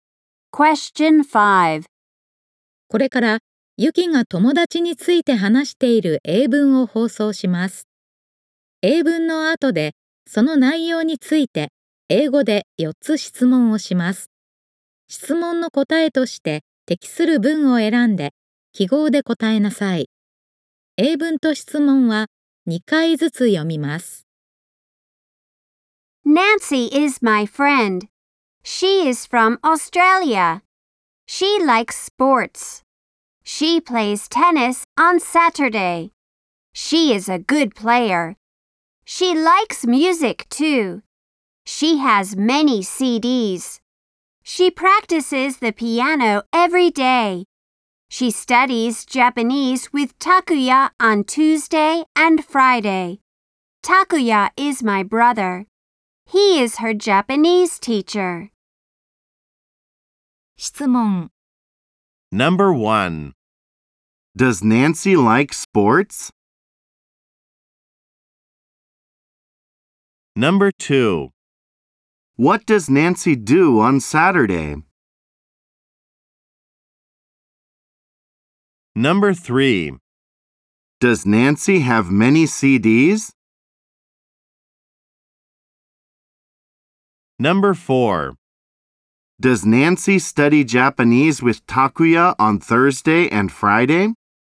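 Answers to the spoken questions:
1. Yes, she does.
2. She plays tennis.
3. Yes, she does.
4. No, she doesn't.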